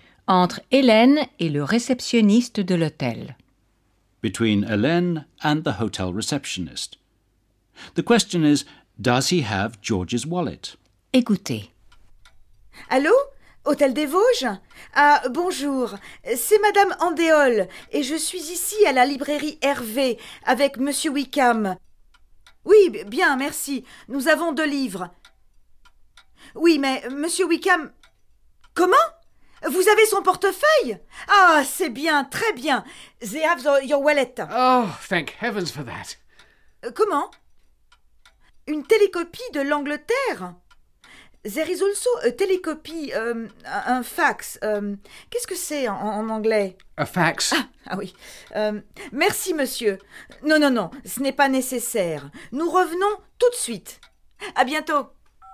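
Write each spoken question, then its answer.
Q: The question is, does he have George's wallet?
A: Yes, the hotel has George's wallet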